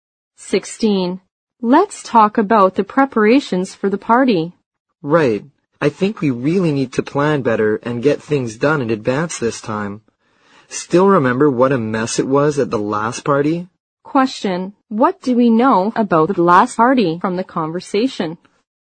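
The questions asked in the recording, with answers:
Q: What do we know about the last party from the conversation?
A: It was a mess because it wasn't planned well in advance.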